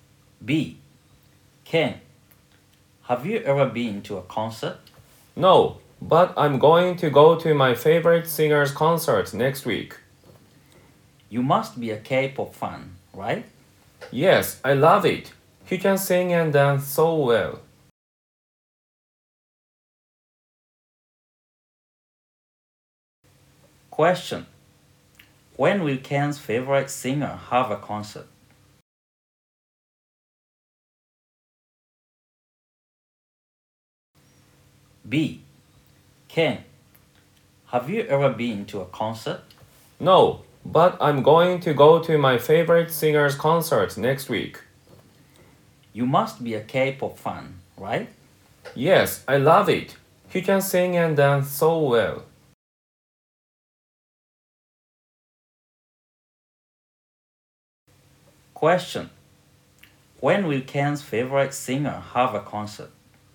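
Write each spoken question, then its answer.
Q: When will Ken's favorite singer have a concert?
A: Next week.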